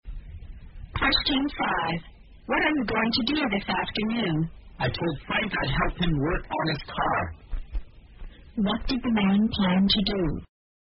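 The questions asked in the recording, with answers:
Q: What did the man plan to do?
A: Help Frank work on his car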